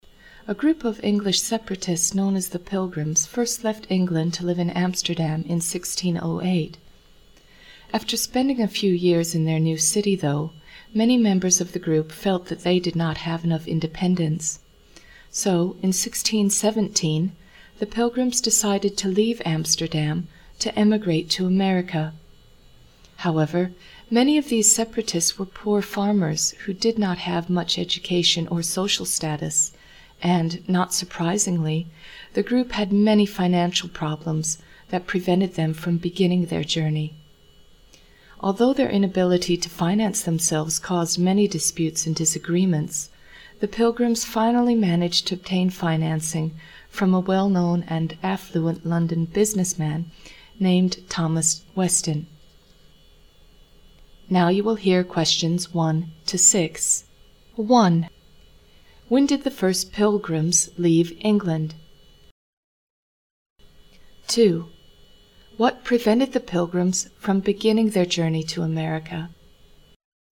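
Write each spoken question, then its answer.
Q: When did the first Pilgrims leave England?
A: In 1608

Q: What prevented the Pilgrims from beginning their journey to America?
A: Financial problems (lack of money)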